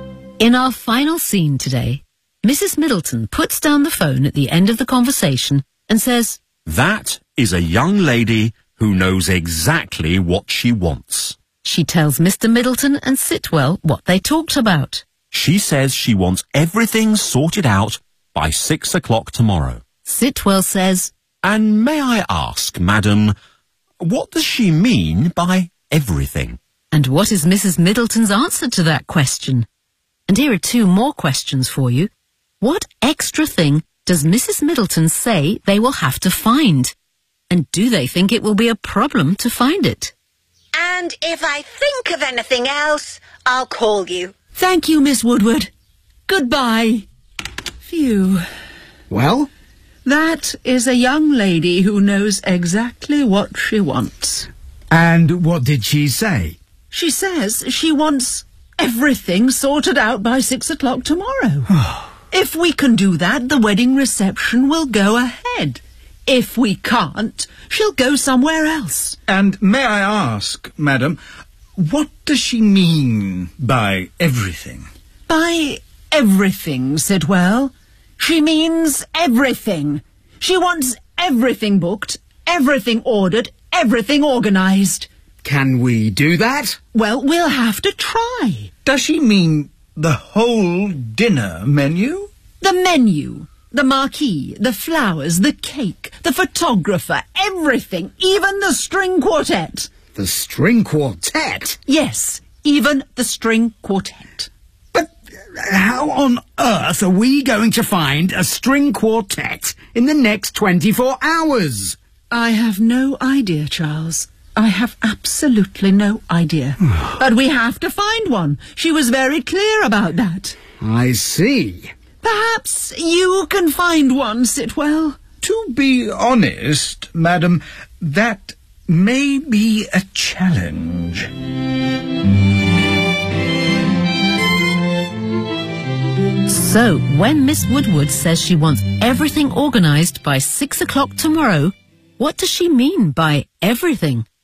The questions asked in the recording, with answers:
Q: And what is Mrs. Middleton's answer to that question?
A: by everything, she means everything.

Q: What extra thing does Mrs. Middleton say they will have to find?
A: A string quartet.

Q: And do they think it will be a problem to find it?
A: Yes.